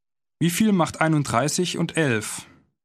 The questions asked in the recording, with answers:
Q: Wie viel macht 31 und 11?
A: Zweiundvierzig. Das macht 42.